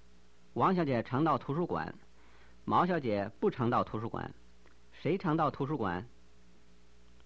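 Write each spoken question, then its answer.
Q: 谁常到图书馆?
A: 王小姐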